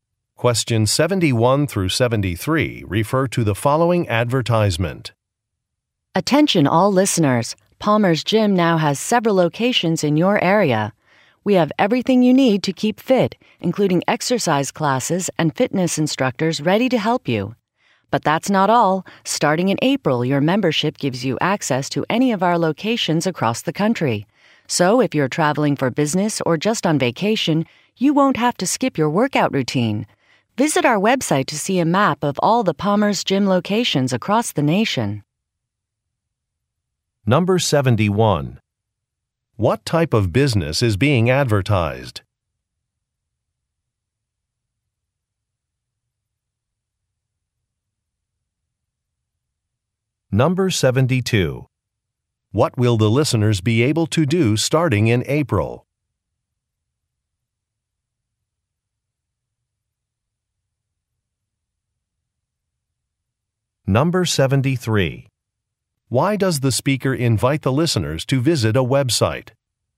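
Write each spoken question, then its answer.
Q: What type of business is being advertised?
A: A gym

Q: What will the listeners be able to do starting in April?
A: Use any location across the country

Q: Why does the speaker invite the listeners to visit a website?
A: To see a map of locations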